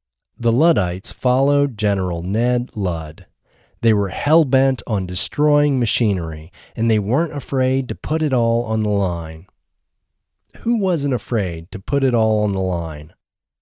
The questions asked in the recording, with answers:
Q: Who wasn't afraid to put it all on the line?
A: The Luddites weren't afraid to put it all on the line.